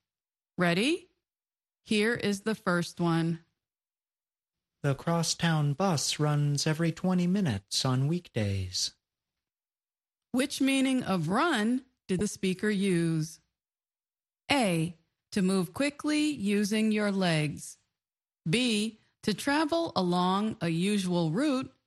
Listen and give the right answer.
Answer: The answer is B. To travel along a usual route.